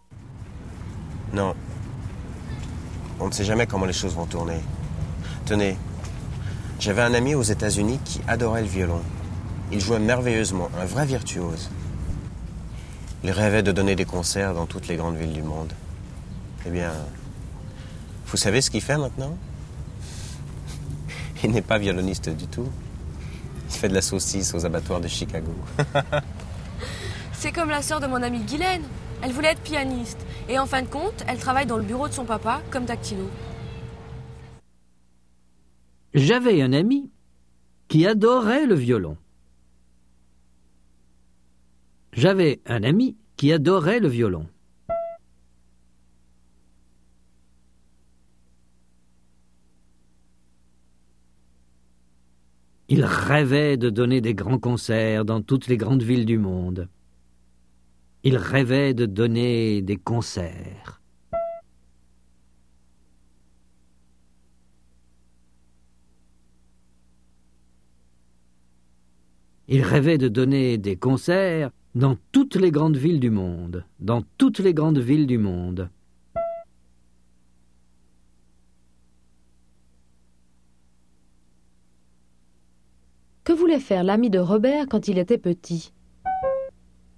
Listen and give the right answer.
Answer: Il voulait donner des concerts dans toutes les grandes villes du monde.